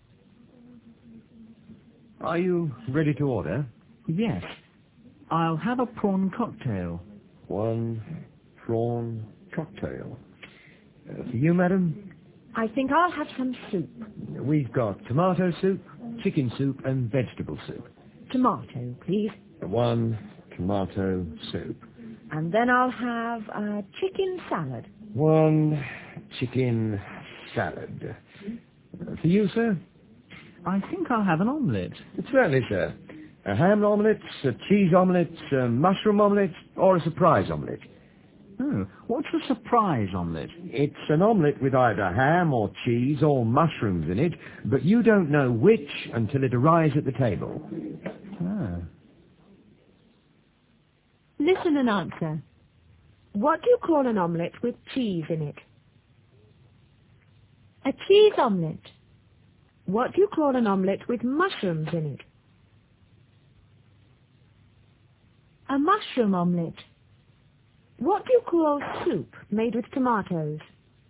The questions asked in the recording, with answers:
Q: What do you call an omelette with cheese in it?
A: A cheese omelette.

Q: What do you call an omelette with mushrooms in it?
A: A mushroom omelette.

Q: What do you call soup made with tomatoes?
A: Tomato soup.